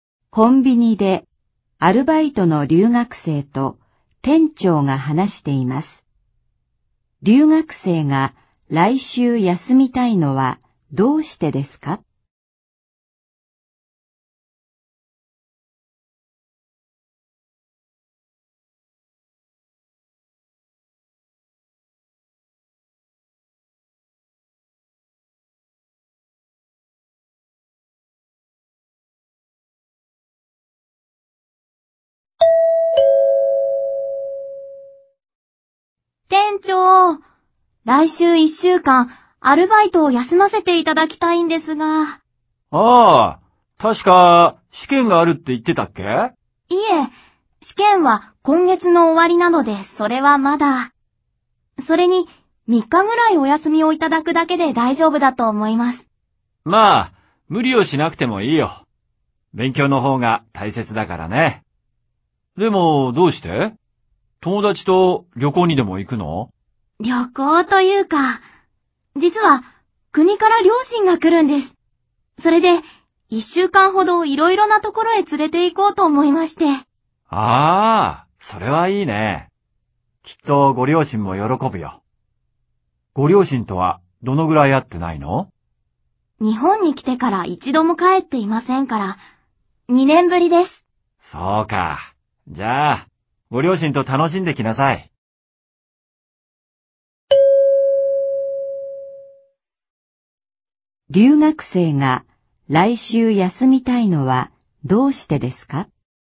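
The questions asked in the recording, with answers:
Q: 留学生が来週休みたいのはどうしてですか?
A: 国から両親が来て、いろいろなところへ連れて行くから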